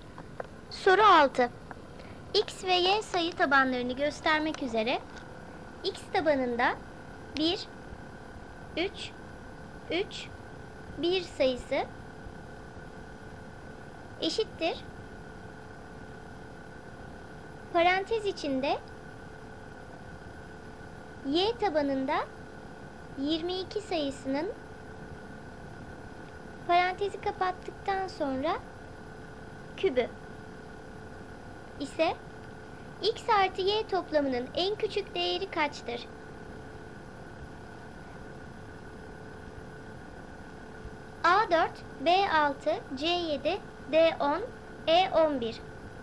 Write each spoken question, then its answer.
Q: Y tabanında 22 sayısının parantezi kapattıktan sonra kübü ise X artı Y toplamının en küçük değeri kaçtır?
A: Doğru cevap D 10.